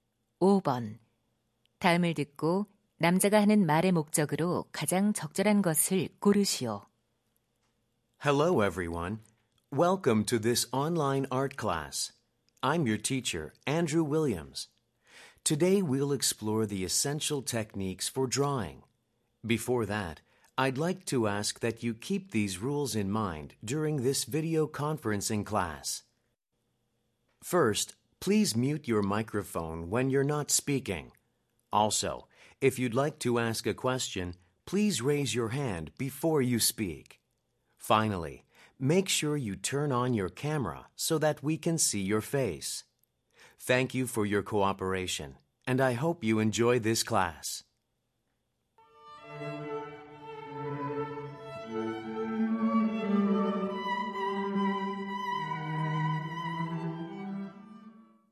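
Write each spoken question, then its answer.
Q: 다음을 듣고 남자가 하는 말의 목적으로 가장 적절한 것을 고르시오.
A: 화상 수업 규칙 안내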